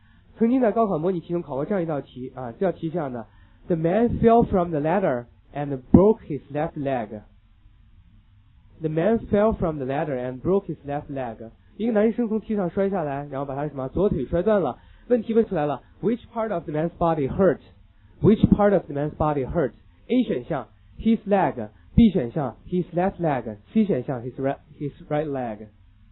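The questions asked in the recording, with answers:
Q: Which part of the man's body hurt?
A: B: his left leg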